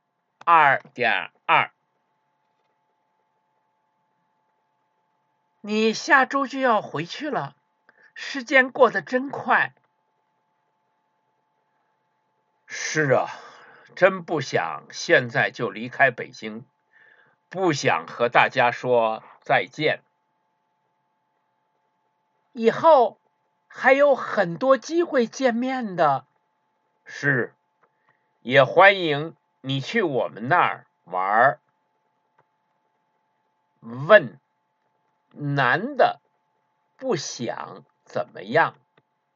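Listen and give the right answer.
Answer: 不想现在离开北京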